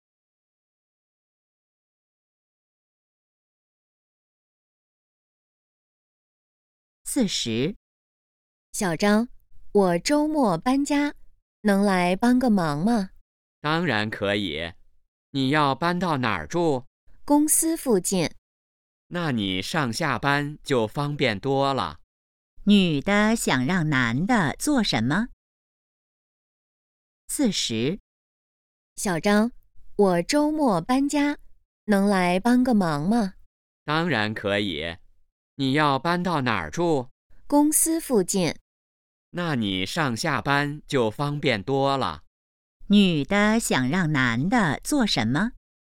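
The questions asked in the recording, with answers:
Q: 女的想让男的做什么?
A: 周末帮忙搬家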